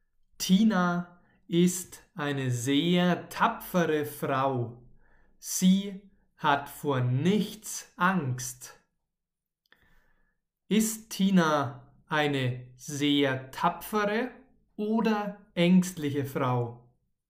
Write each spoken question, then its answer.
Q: Ist Tina eine sehr tapfere oder ängstliche Frau?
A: Eine sehr tapfere. Tina ist eine sehr tapfere Frau.